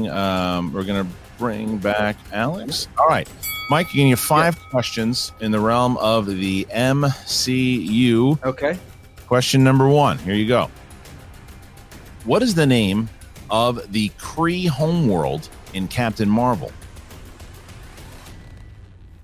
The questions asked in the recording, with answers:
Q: What is the name of the Kree homeworld in Captain Marvel?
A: Hala.